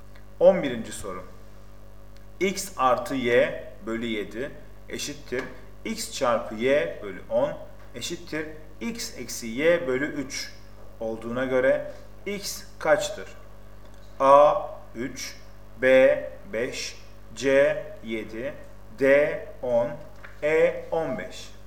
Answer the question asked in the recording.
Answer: Doğru cevap B 5.